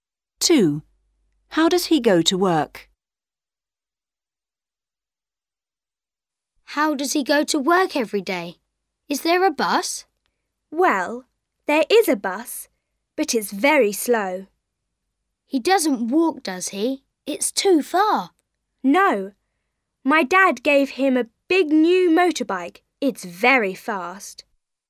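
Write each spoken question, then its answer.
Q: How does he go to work?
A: By motorbike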